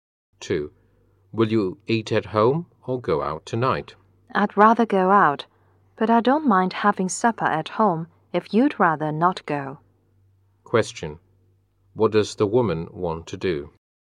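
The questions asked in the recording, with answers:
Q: What does the woman want to do?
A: Go out for supper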